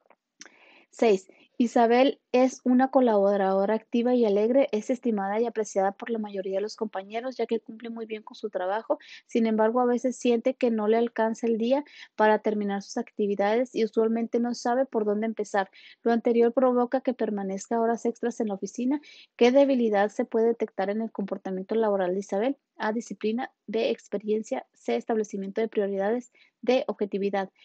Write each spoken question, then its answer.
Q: ¿Qué debilidad se puede detectar en el comportamiento laboral de Isabel?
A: Y la respuesta correcta es la C, establecimiento de prioridades.